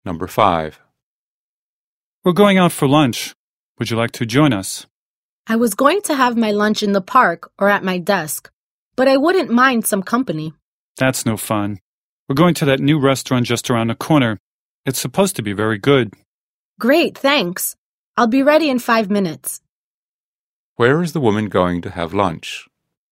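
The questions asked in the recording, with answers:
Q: Where is the woman going to have lunch?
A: At the new restaurant just around the corner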